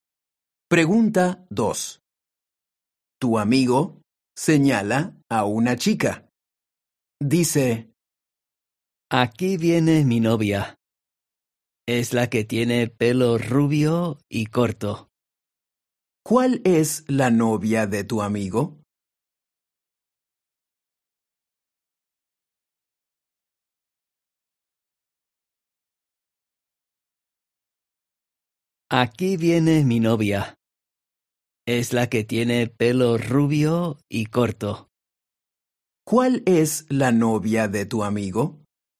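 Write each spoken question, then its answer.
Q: ¿Cuál es la novia de tu amigo?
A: La que tiene pelo rubio y corto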